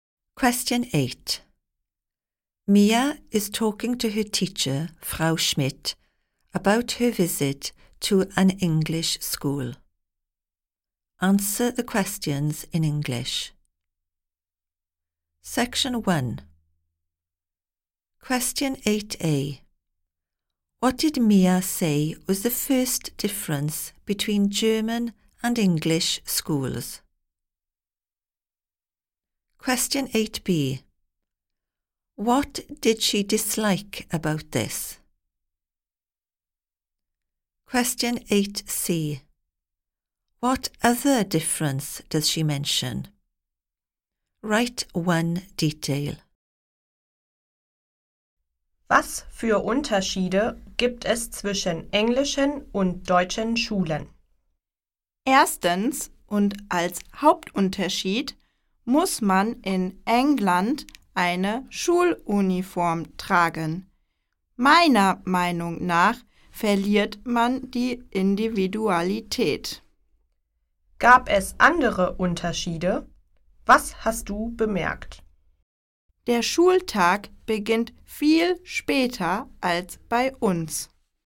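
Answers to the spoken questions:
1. In England you have to wear a school uniform
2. You lose your individuality
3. The school day starts much later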